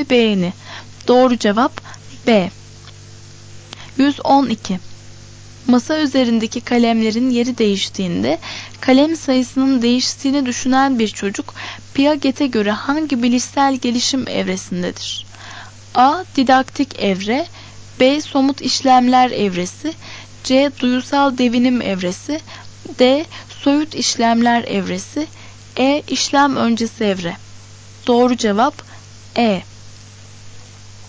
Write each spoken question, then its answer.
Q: Masa üzerindeki kalemlerin yeri değiştiğinde kalem sayısının değiştiğini düşünen bir çocuk Piaget'e göre hangi bilişsel gelişim evresindedir?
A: Doğru cevap E.